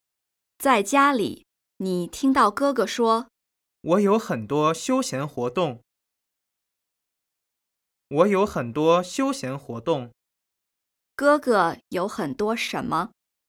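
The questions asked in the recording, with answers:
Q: 哥哥有很多什么?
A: 休闲活动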